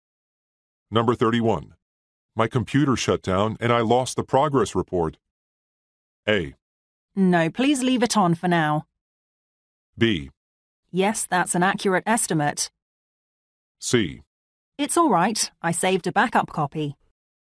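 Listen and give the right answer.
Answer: C: It's all right. I saved a backup copy.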